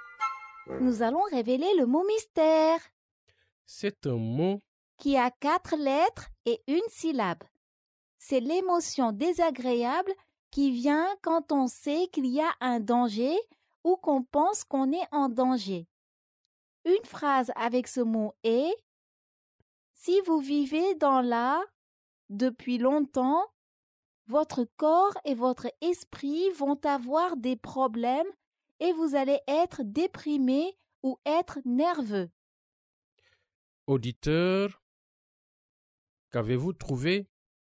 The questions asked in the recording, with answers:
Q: Auditeur, qu'avez-vous trouvé?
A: Le mot mystère est peur.